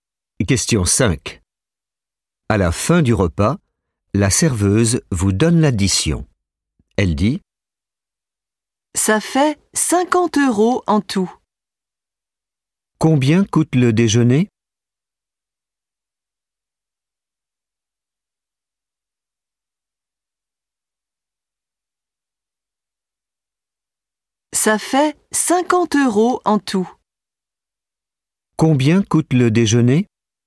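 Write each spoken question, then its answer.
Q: Combien coûte le déjeuner ?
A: 50 euros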